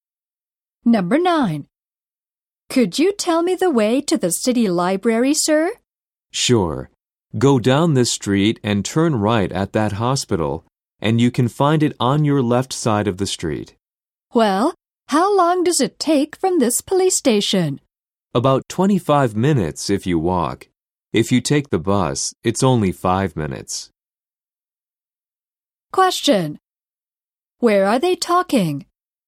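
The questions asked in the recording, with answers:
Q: Where are they talking?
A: At the police station.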